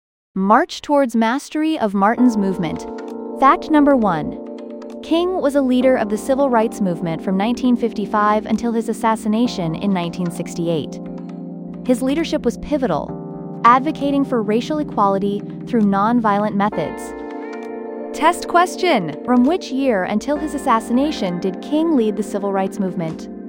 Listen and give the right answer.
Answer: Correct answer, 1955 to 1968.